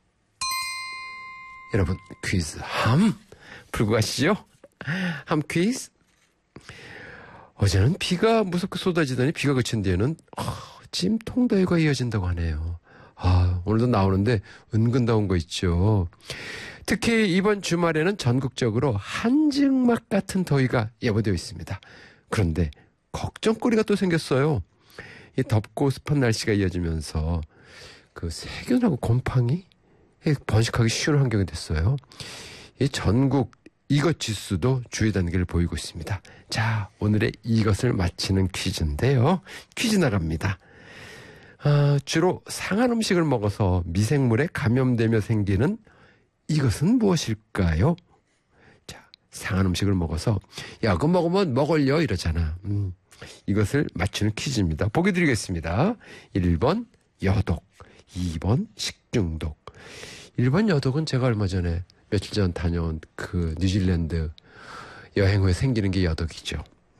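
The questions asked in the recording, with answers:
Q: 아, 주로 상한 음식을 먹어서 미생물에 감염되며 생기는 이것은 무엇일까요?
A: 2: 식중독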